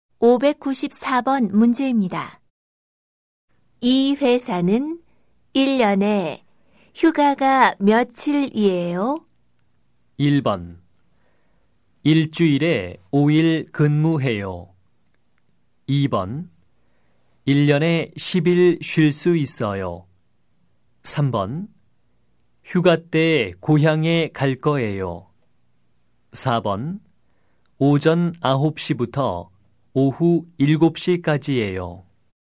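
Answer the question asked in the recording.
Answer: 2: 1년에 10일 쉴 수 있어요.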